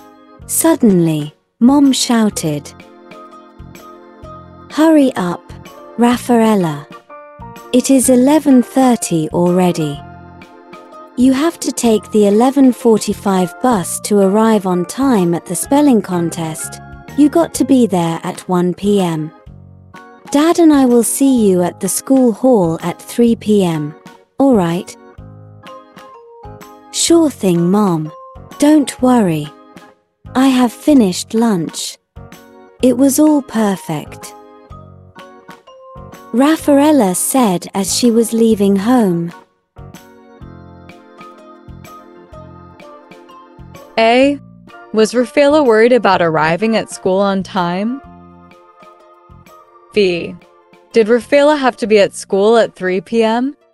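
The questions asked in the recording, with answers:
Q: Was Raffaella worried about arriving at school on time?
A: No

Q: Did Raffaella have to be at school at 3 p.m.?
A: No, at 1 p.m.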